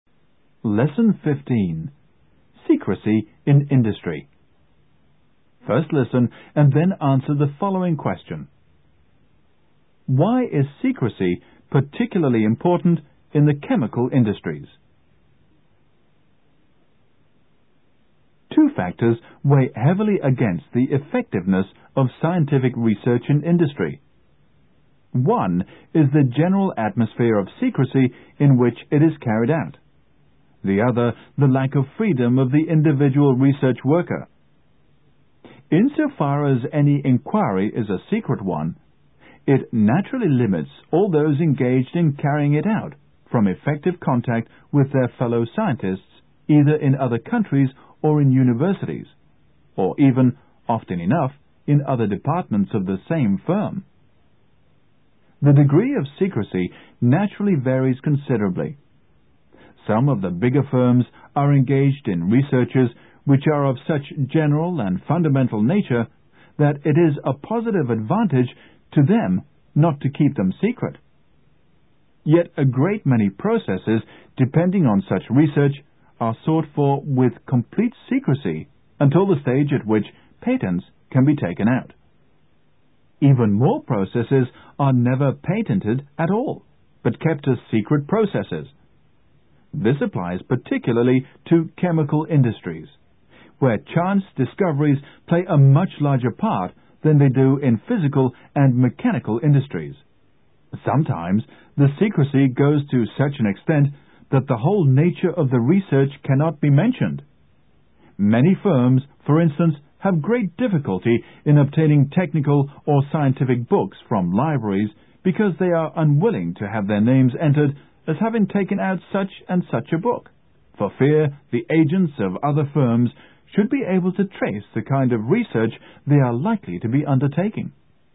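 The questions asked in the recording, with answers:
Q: Why is secrecy particularly important in the chemical industries?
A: Because chance discoveries play a much larger part in them than in physical and mechanical industries, so many processes are never patented but kept secret.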